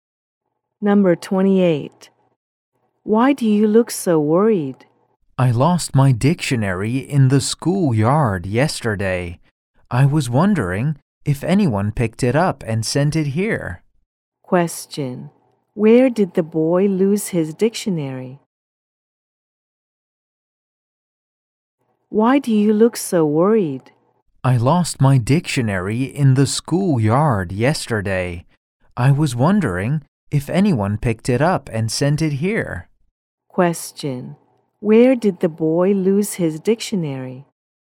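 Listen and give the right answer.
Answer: In the schoolyard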